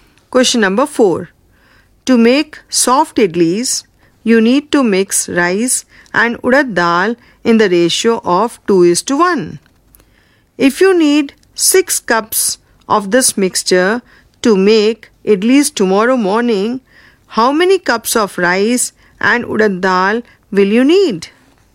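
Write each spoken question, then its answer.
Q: If you need 6 cups of this mixture to make idlis tomorrow morning, how many cups of rice and urad dal will you need?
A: 4 cups of rice and 2 cups of urad dal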